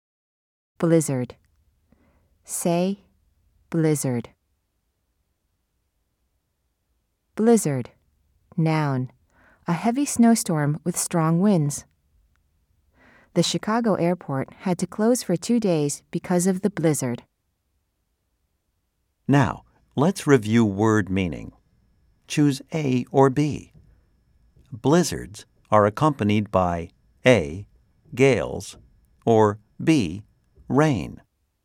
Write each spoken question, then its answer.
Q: Choose A or B. Blizzards are accompanied by A, gales, or B, rain.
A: If you said A, you are right.